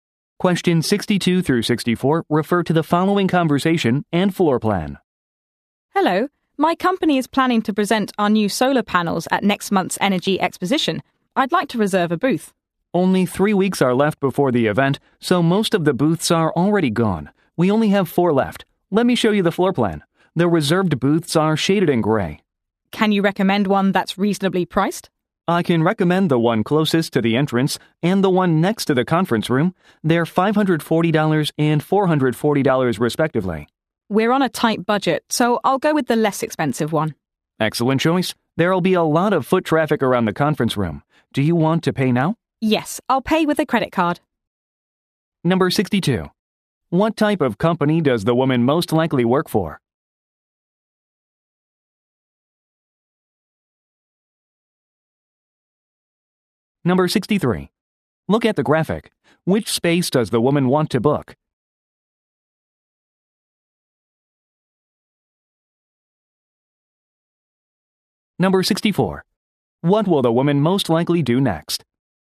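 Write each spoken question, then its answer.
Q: What type of company does the woman most likely work for?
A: A solar panel company

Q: What will the woman most likely do next?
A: Pay by credit card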